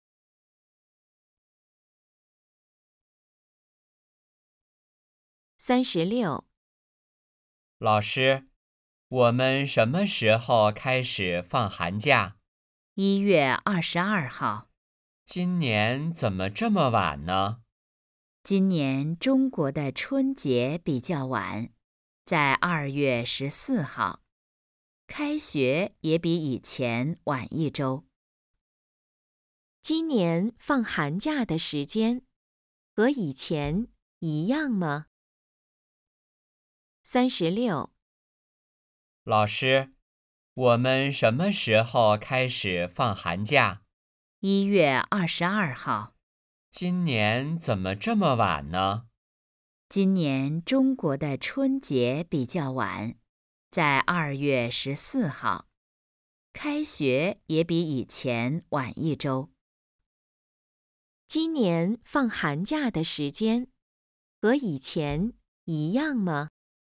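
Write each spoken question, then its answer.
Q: 今年放寒假的时间和以前一样吗?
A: 不一样,比以前晚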